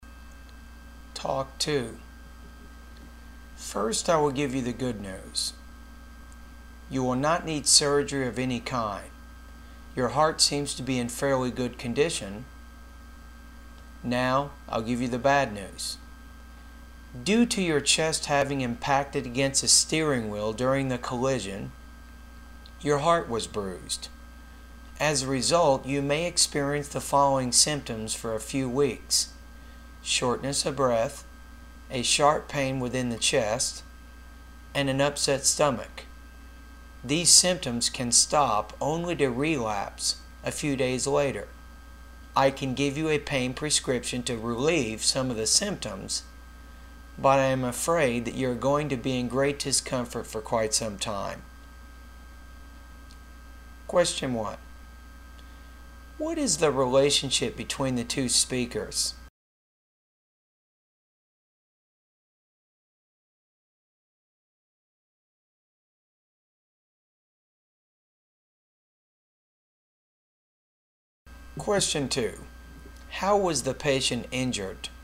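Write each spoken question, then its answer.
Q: What is the relationship between the two speakers?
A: Doctor and patient

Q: How was the patient injured?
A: In a car collision, the chest hit the steering wheel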